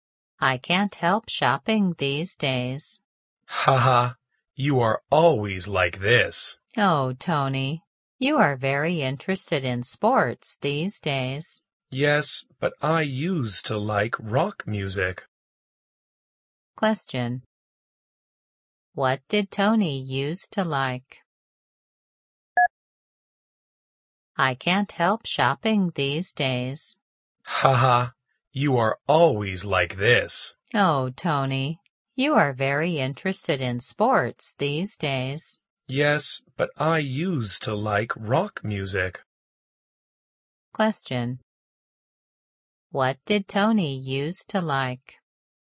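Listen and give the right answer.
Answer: Rock music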